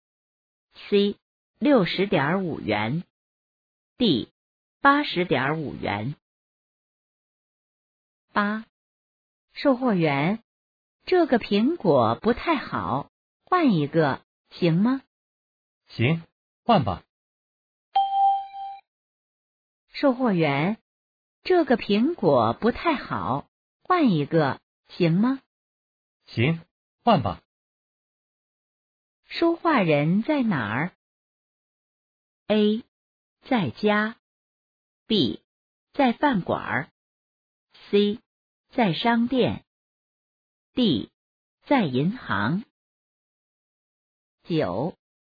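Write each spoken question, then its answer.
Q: 说话人在哪儿?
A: C: 在商店。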